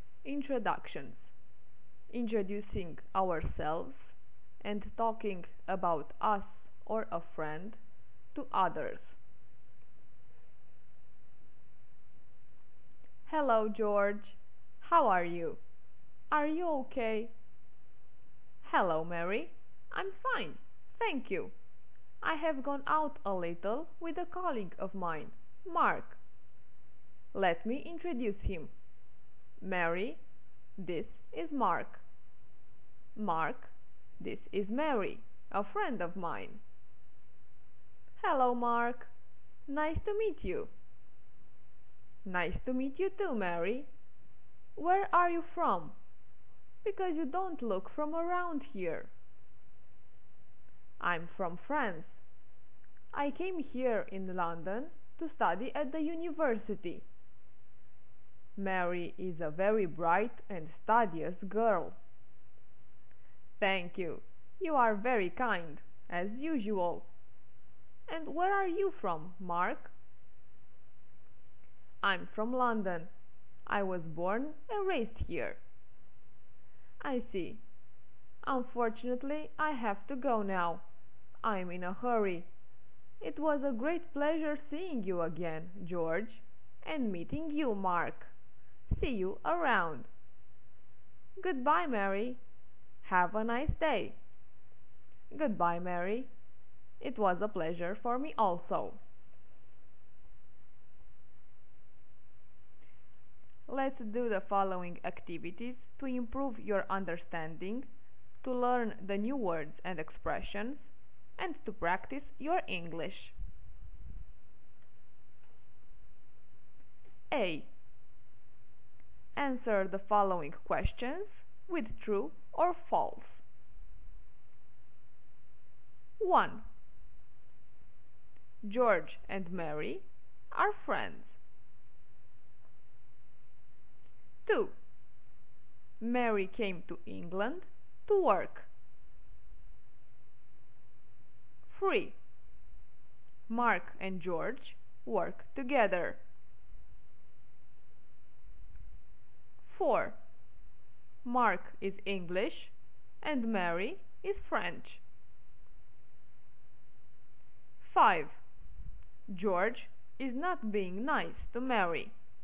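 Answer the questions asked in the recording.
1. True
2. False
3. True
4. True
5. False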